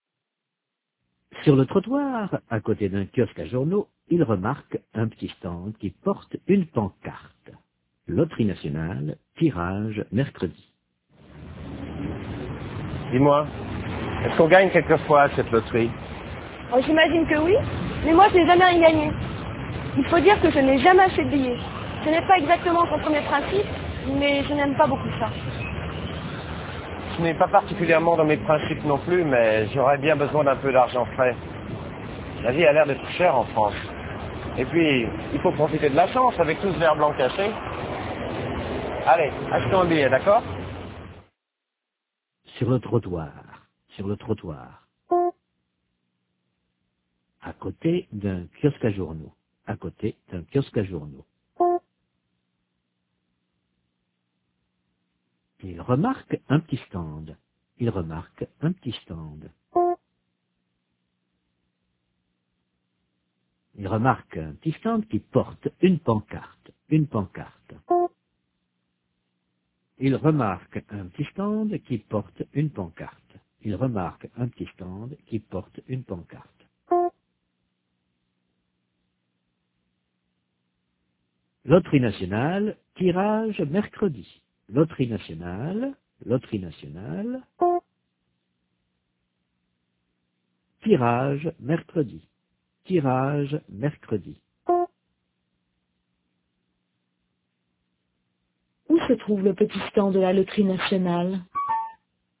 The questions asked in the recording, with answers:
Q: Où se trouve le petit stand de la loterie nationale?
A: Sur le trottoir, à côté d'un kiosque à journaux.